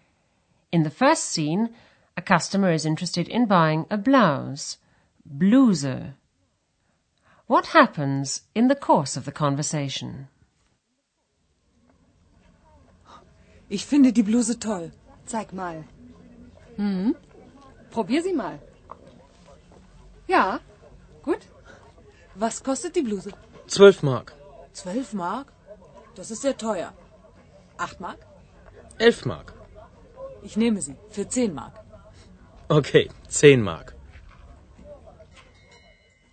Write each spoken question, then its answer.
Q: What happens in the course of the conversation?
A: The customer strikes a compromise and says she'll take it for 10 marks.